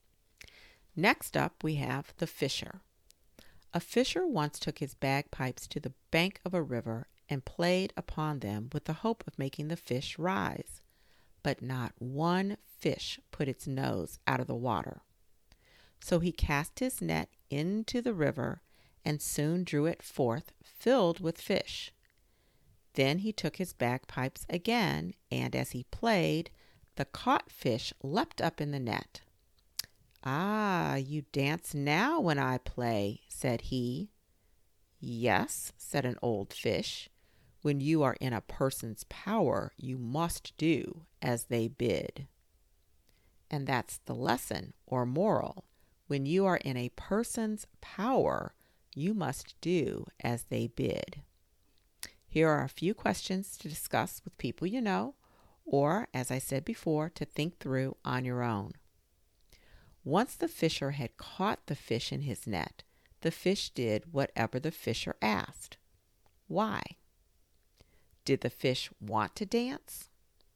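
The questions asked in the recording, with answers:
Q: Why? Did the fish want to dance?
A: No; they were in the fisher's power, so they had to do as he wanted.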